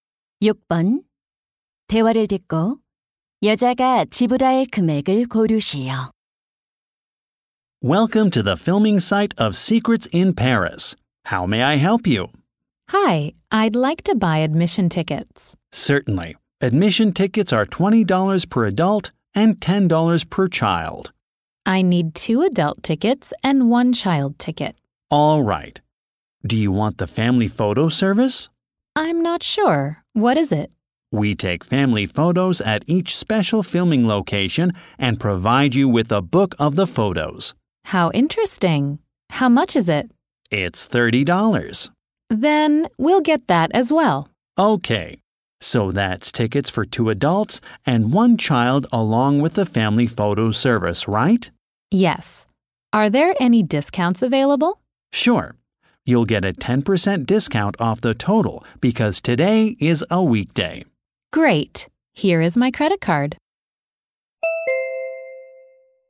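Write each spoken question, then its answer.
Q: 대화를 듣고 여자가 지불할 금액을 고르시오.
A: 72달러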